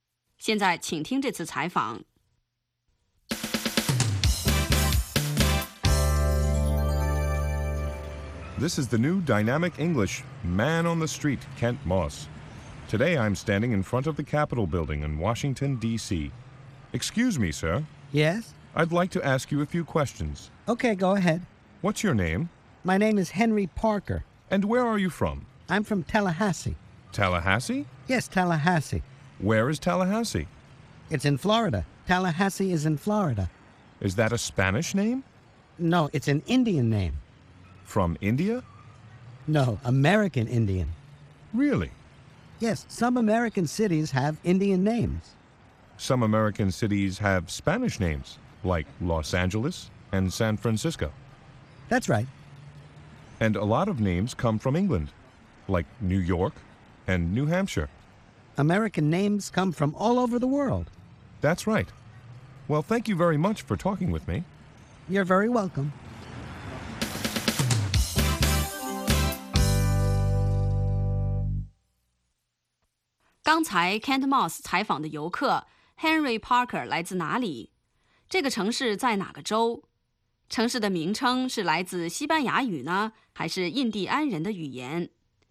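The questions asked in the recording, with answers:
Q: Kent Moss 采访的游客 Henry Parker 来自哪里?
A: 塔拉哈西(Tallahassee)

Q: 这个城市在哪个州?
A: 佛罗里达州(Florida)

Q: 城市的名称是来自西班牙语呢,还是印第安人的语言?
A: 来自美洲印第安人的语言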